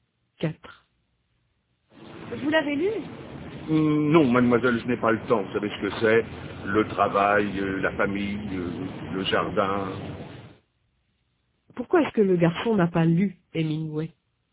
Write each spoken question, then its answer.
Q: Pourquoi est-ce que le garçon n'a pas lu Hemingway?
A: Parce qu'il n'a pas le temps.